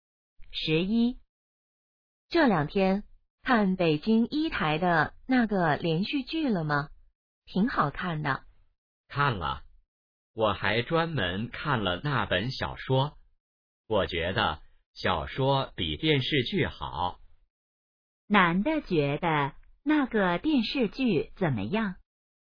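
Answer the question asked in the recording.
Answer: 不如小说好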